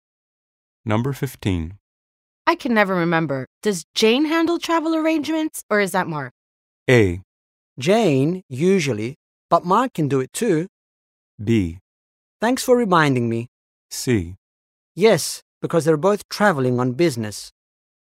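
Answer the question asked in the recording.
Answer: A: Jane, usually, but Mark can do it too.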